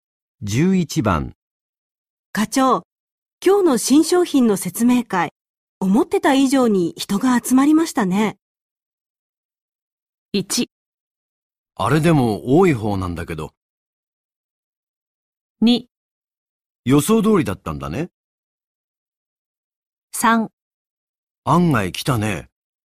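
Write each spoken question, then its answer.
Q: の新商品の説明会、思ってた以上に人が集まりましたね。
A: 3: 案外来たね。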